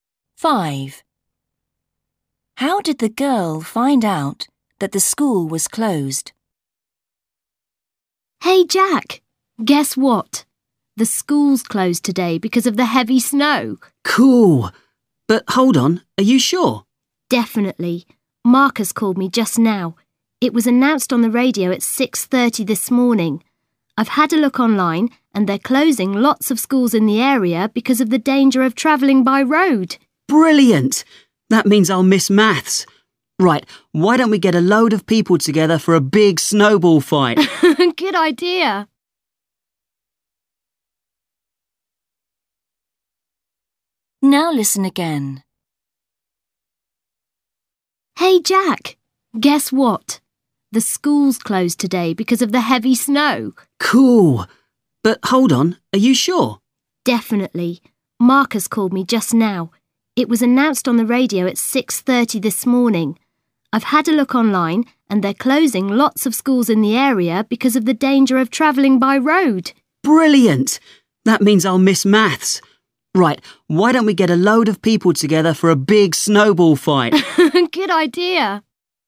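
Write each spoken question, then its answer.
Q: How did the girl find out that the school was closed?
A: a friend (Marcus) phoned her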